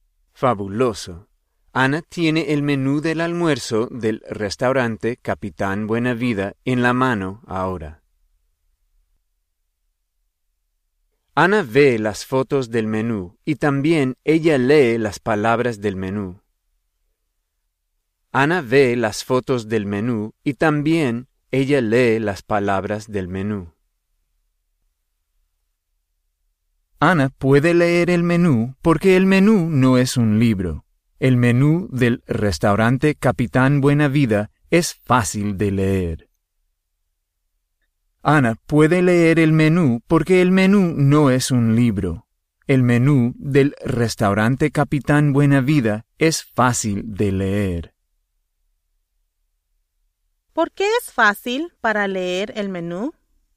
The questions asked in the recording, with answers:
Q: ¿Por qué es fácil para leer el menú?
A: Es fácil de leer el menú porque el menú no es un libro.